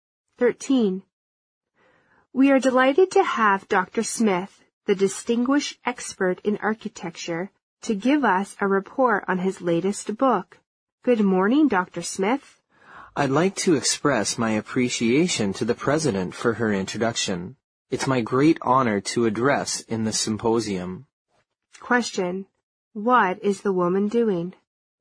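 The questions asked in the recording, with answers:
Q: What is the woman doing?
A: Introducing a speaker (Dr. Smith) at a symposium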